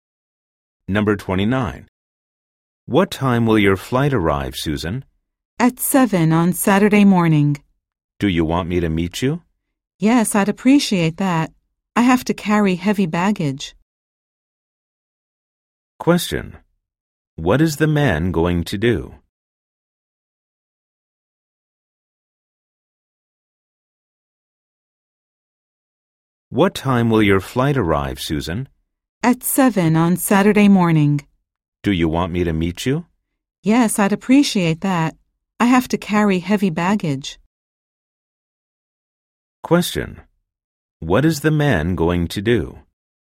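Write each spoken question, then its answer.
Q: What is the man going to do?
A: Meet Susan when her flight arrives at 7 on Saturday morning.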